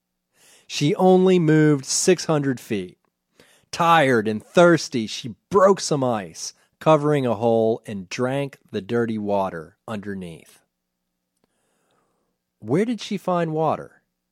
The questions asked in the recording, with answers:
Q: Where did she find water?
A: She found water in a hole covered with ice.